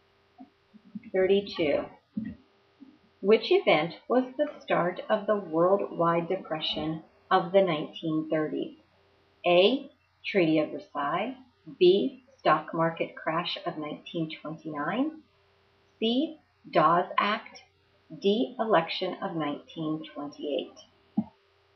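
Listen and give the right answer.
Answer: B: Stock market crash of 1929.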